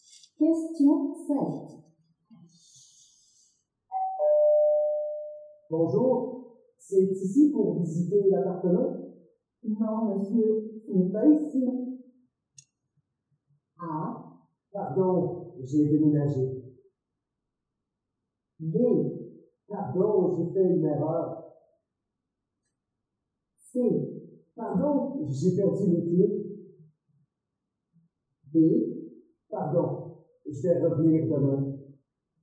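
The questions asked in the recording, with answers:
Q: Bonjour, c'est ici pour visiter l'appartement? Non, monsieur, ce n'est pas ici.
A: B: pardon, j'ai fait une erreur.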